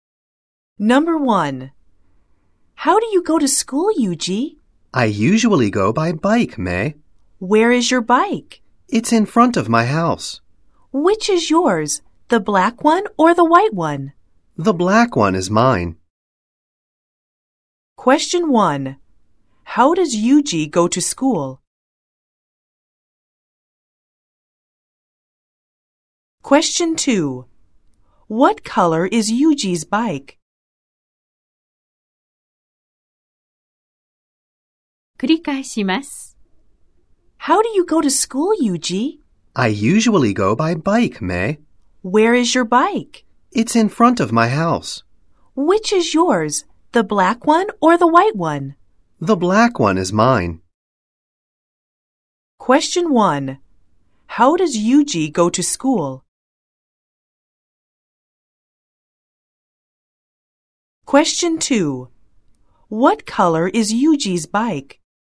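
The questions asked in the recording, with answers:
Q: How does Yuji go to school?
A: 自転車で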